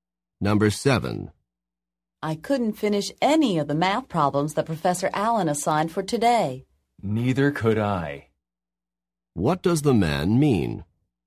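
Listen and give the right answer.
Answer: He couldn't finish the math problems either.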